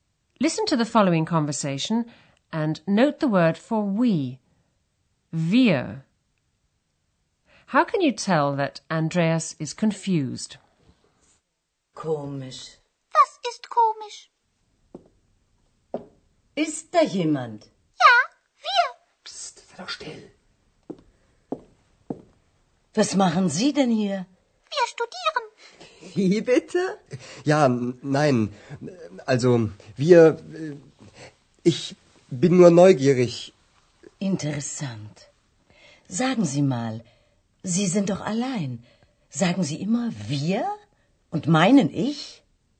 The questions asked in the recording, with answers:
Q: How can you tell that Andreas is confused?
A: He begins to stutter.